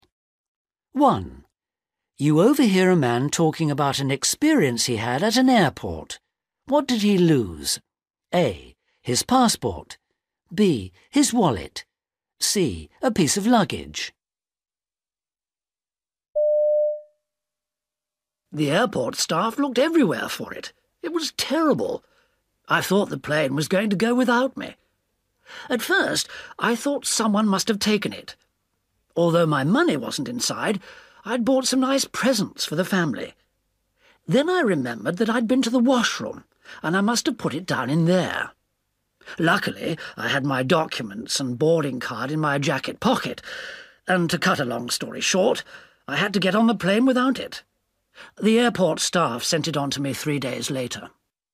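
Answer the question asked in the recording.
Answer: C: A piece of luggage.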